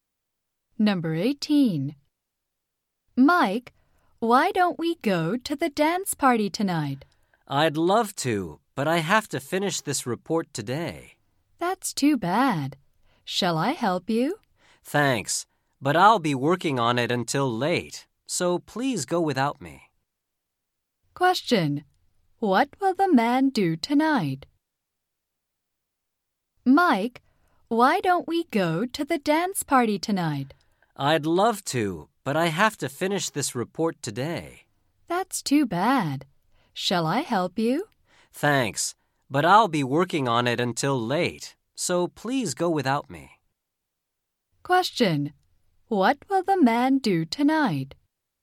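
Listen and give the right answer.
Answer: He will work on his report.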